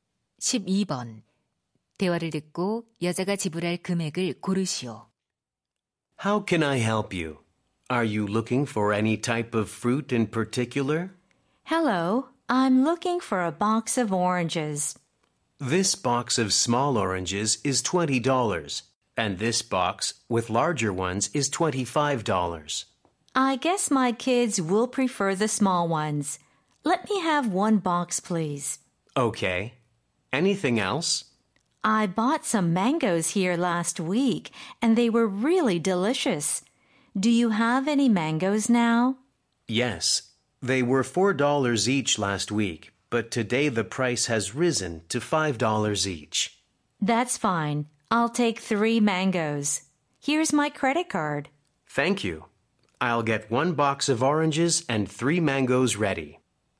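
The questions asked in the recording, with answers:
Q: 대화를 듣고 여자가 지불할 금액을 고르시오.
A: 35달러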